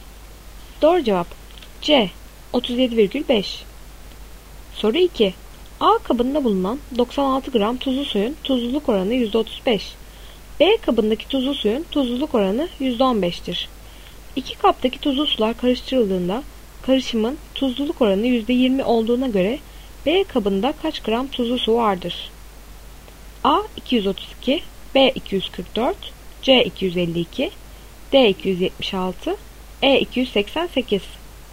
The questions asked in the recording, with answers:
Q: İki kaptaki tuzlu sular karıştırıldığında karışımın tuzluluk oranı %20 olduğuna göre B kabında kaç gram tuzlu su vardır?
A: Doğru cevap E 288.